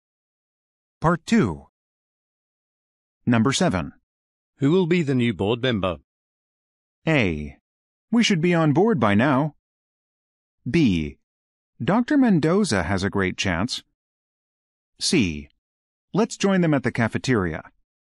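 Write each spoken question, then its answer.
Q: Who will be the new board member?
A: B: Dr. Mendoza has a great chance.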